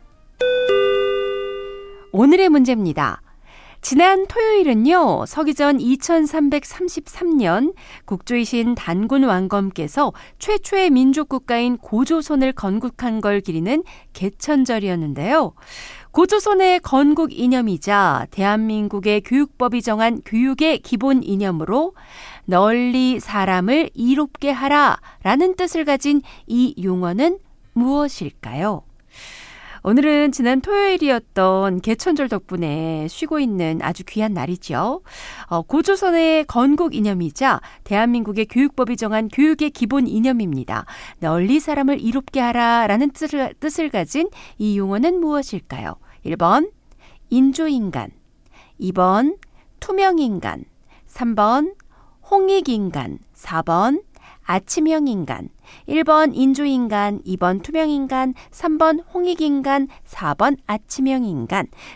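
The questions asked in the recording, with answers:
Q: 고조선의 건국 이념이자 대한민국의 교육법이 정한 교육의 기본 이념으로 널리 사람을 이롭게 하라 라는 뜻을 가진 이 용어는 무엇일까요?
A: 3: 홍익인간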